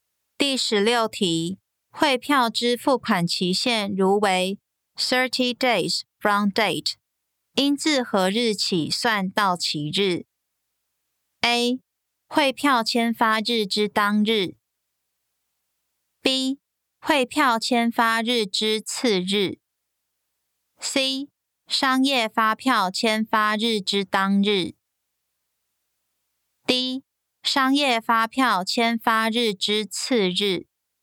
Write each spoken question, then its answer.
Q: 汇票之付款期限如为 30 days from date, 应自何日起算到期日?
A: 正确答案为 B. 汇票签发日之次日。